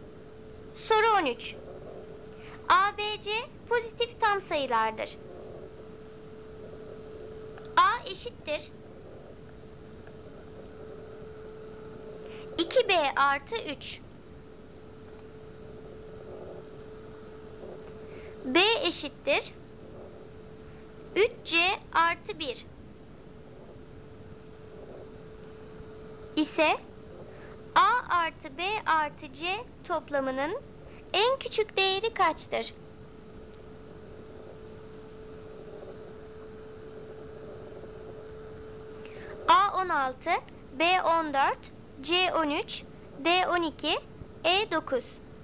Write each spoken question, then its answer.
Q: İse A artı B artı C toplamının en küçük değeri kaçtır?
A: Doğru cevap A 16.